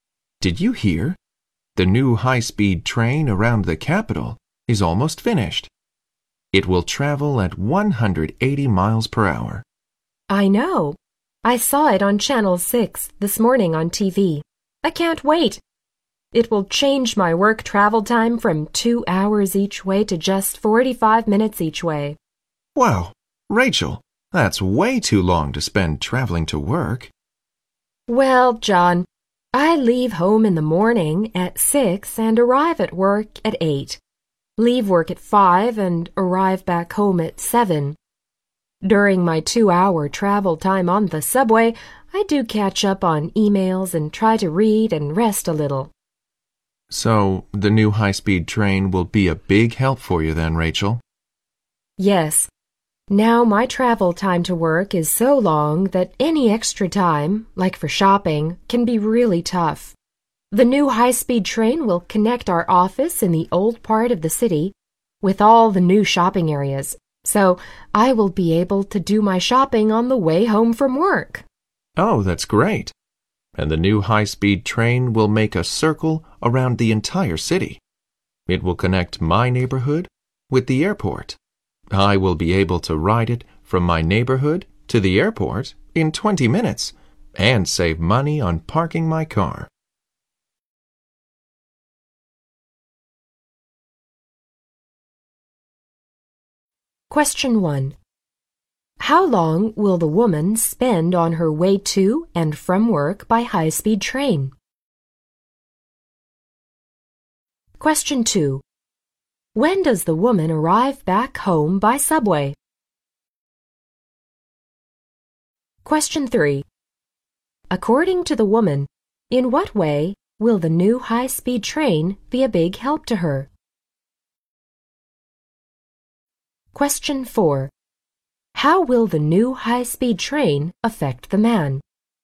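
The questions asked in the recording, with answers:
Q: how long will the woman spend on her way to and from work by high-speed train?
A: 90 minutes (45 minutes each way)

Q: When does the woman arrive back home by subway?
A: At 7

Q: According to the woman, in what way will the new high-speed train be a big help to her?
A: She will be able to shop on the way home from work

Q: How will the new high-speed train affect the man?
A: He can ride it to the airport in 20 minutes and save money on parking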